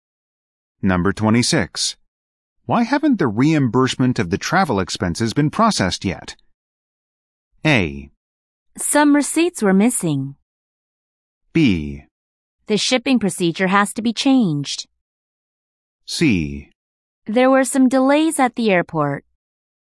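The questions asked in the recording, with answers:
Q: Why haven't the reimbursement of the travel expenses been processed yet?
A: A: Some receipts were missing.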